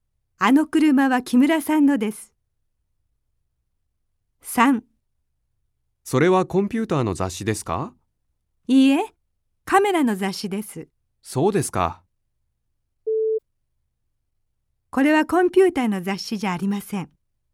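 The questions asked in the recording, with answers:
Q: これはコンピューターの雑誌じゃありません。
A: はい(○):カメラの雑誌です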